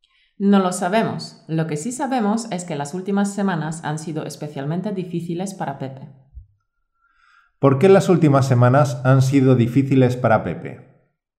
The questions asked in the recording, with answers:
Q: ¿Por qué las últimas semanas han sido difíciles para Pepe?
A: porque no ha habido suficiente personal y Pepe tiene demasiado trabajo.